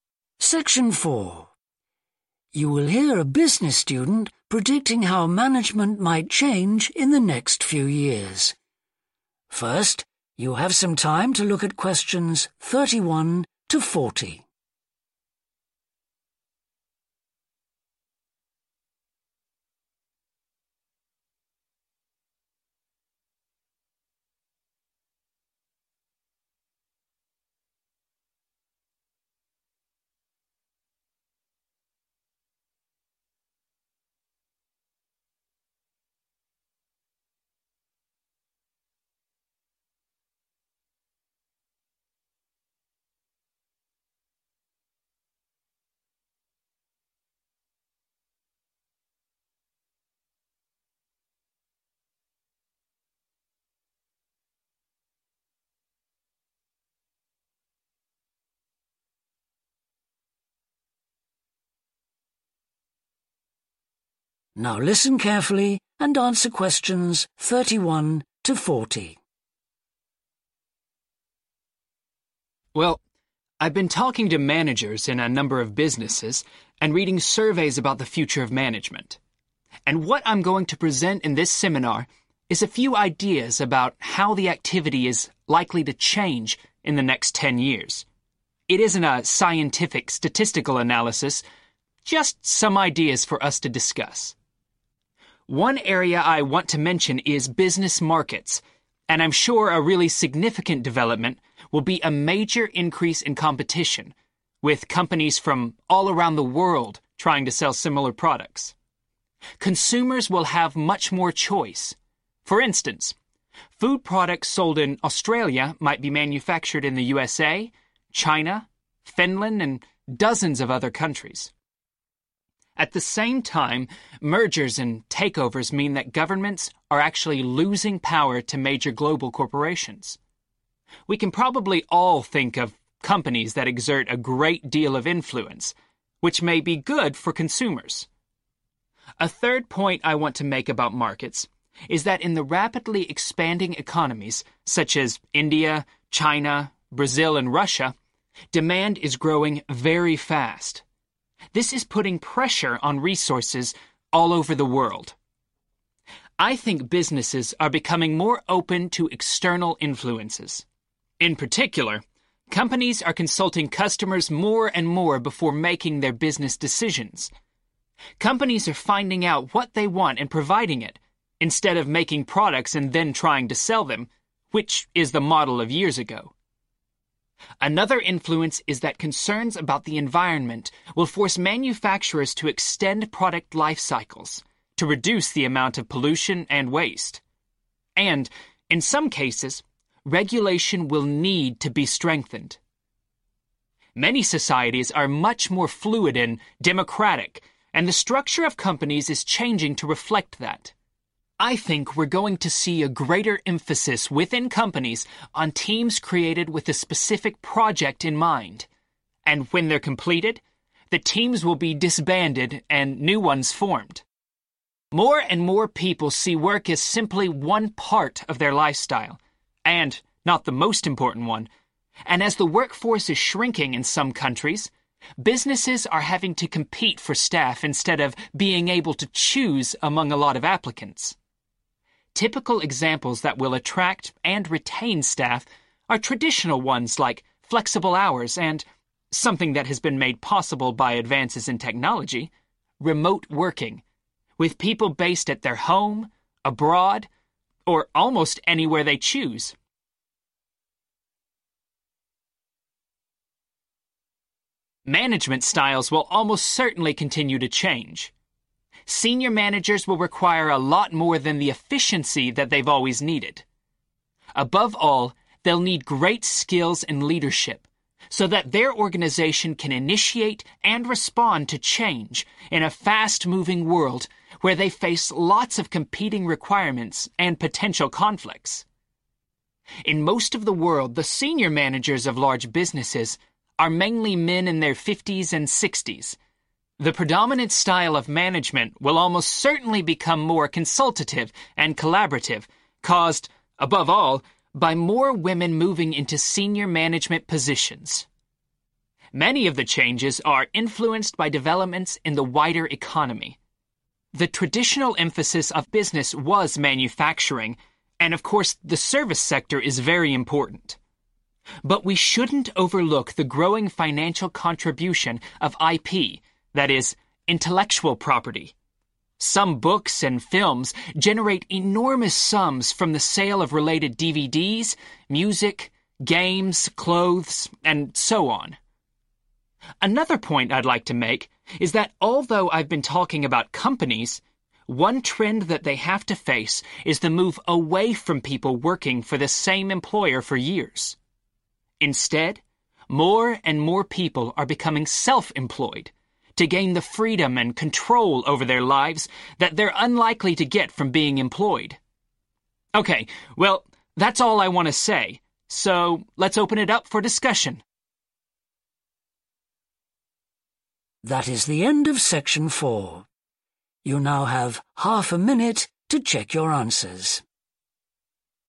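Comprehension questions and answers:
Complete the notes below. Write ONE WORD ONLY for each answer.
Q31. greater 31.............. among companies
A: competition

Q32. increase in power of large 32.............. companies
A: global

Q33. rising 33............... in certain countries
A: demand

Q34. more discussion with 34.............. before making business decisions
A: customers

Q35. environmental concerns which may lead to more 35.................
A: regulation

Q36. more teams will be formed to work on a particular 36 ....................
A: project

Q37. businesses may need to offer hours that are 37................ or the chance to work remotely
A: flexible

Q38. increasing need for managers to provide good 38...............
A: leadership

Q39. changes influenced by 39................ taking senior roles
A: women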